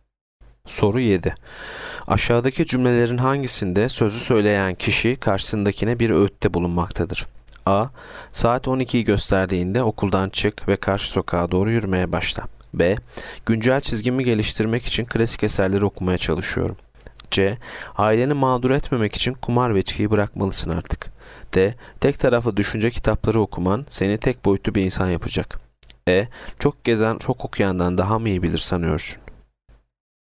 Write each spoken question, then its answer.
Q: Aşağıdaki cümlelerin hangisinde sözü söyleyen kişi karşısındakine bir öğütte bulunmaktadır?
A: Yanıt C. Aileni mağdur etmemek için kumar ve içkiyi bırakmalısın artık.